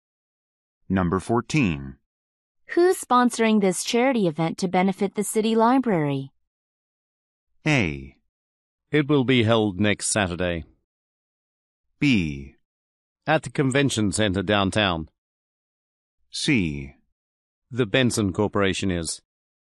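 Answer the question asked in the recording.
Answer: C: The Benson Corporation is.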